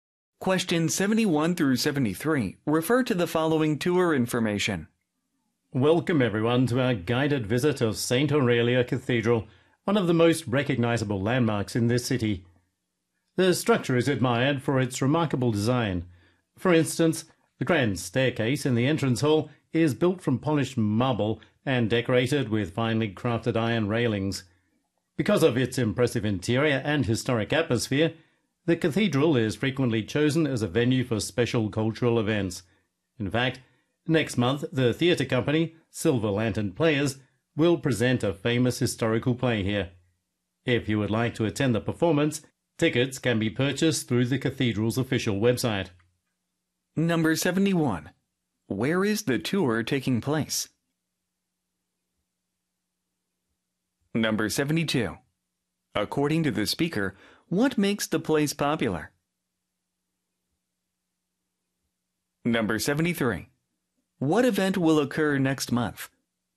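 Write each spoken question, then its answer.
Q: Where is the tour taking place?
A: At St. Aurelia Cathedral

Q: According to the speaker, what makes the place popular?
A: Its remarkable design

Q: What event will occur next month?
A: A historical play performance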